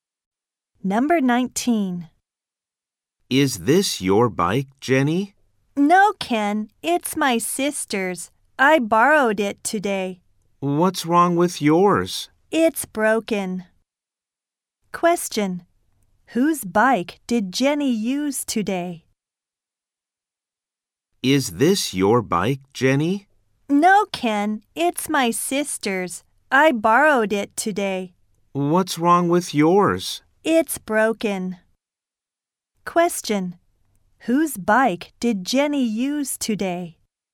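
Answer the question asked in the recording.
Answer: Her sister's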